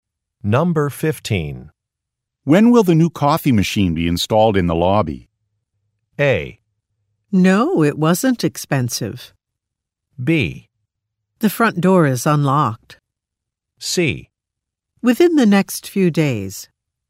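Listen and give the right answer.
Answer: C: Within the next few days.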